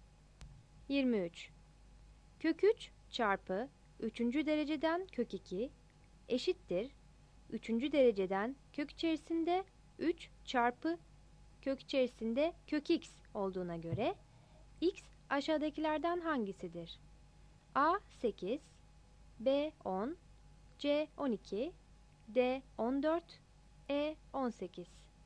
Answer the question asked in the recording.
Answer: 23 C